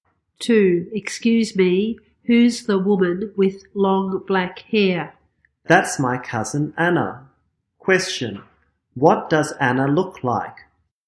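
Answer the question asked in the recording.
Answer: She has long black hair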